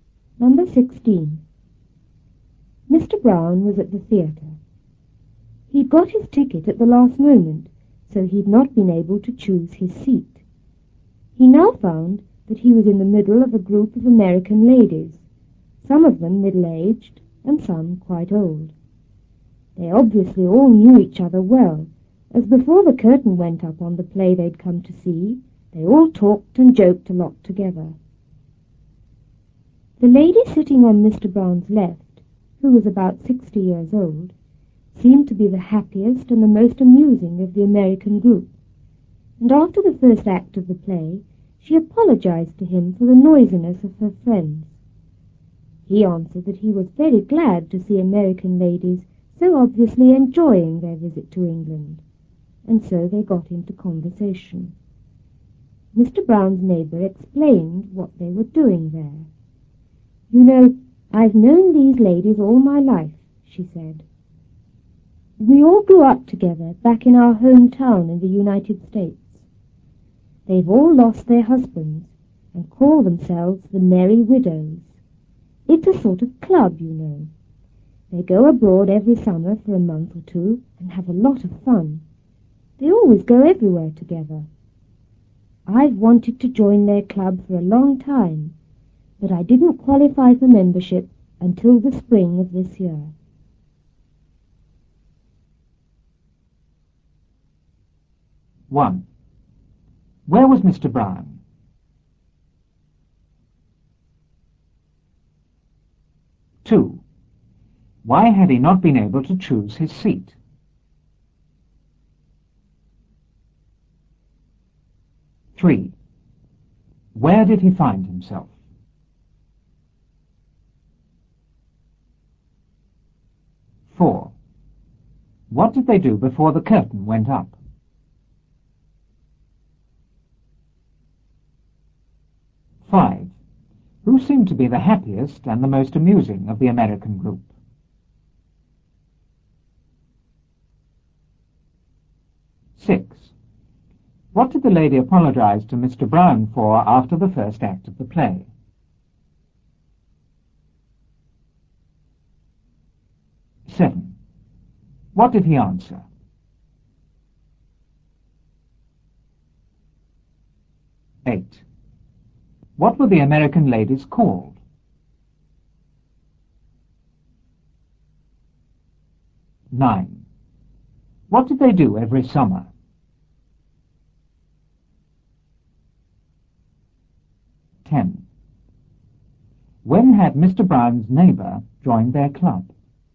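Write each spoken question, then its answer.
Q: Where was Mr. Brown?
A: At the theatre

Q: Why had he not been able to choose his seat?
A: He'd got his ticket at the last moment

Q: Where did he find himself?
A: In the middle of a group of American ladies

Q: What did they do before the curtain went up?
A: They all talked and joked a lot together

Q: Who seemed to be the happiest and the most amusing of the American group?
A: The lady on Mr. Brown's left, about 60 years old

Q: What did the lady apologize to Mr. Brown for after the first act of the play?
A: The noisiness of her friends

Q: What did he answer?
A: He was very glad to see American ladies so obviously enjoying their visit to England

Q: What were the American ladies called?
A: The Merry Widows

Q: What did they do every summer?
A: Went abroad for a month or two and had a lot of fun

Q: When had Mr. Brown's neighbor joined their club?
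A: In the spring of this year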